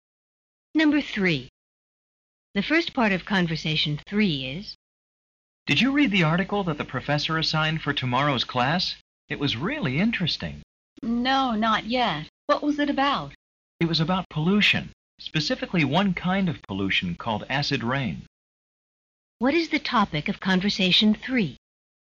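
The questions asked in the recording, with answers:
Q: What is the topic of conversation three?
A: Acid rain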